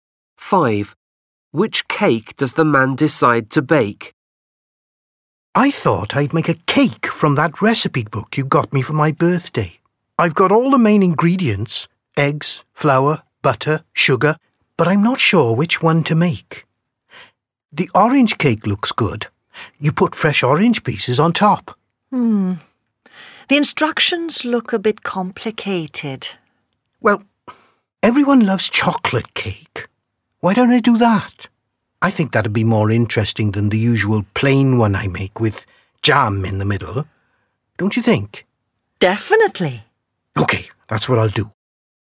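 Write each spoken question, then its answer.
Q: Which cake does the man decide to bake?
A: chocolate cake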